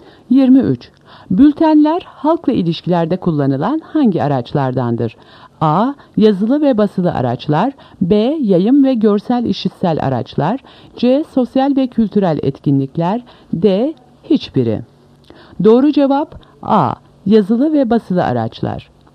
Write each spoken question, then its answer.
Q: Bültenler halkla ilişkilerde kullanılan hangi araçlardandır?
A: Doğru cevap A. Yazılı ve basılı araçlar.